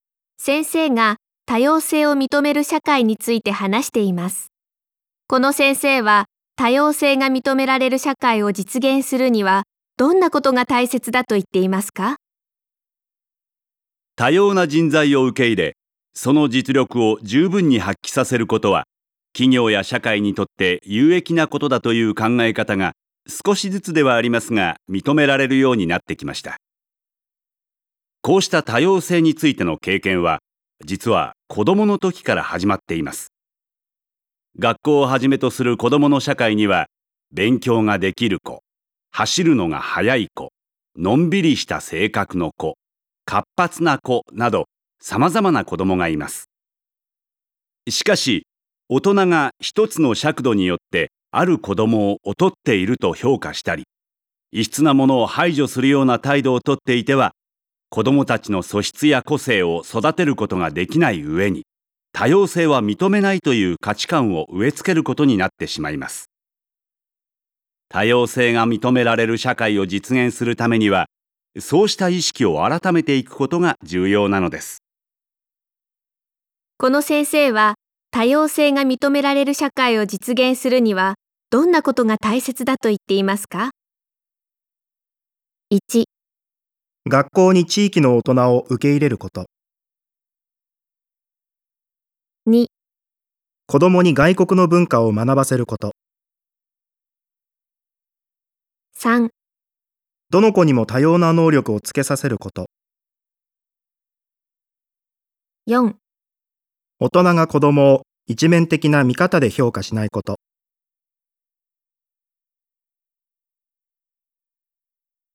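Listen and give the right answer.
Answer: 4: 大人が子どもを一面的な見方で評価しないこと。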